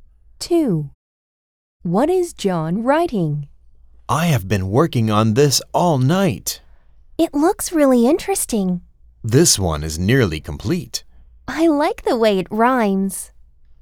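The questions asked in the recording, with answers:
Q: What is John writing?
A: A poem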